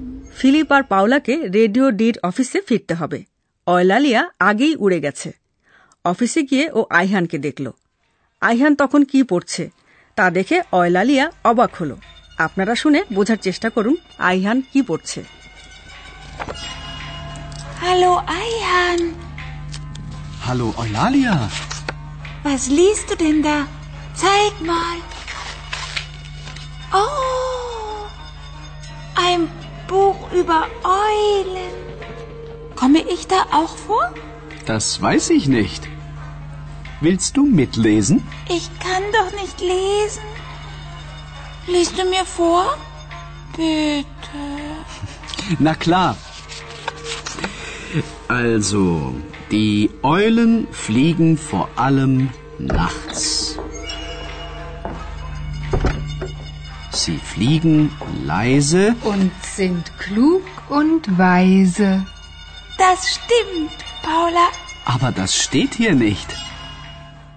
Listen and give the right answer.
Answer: Ayhan একটা বই পড়ছে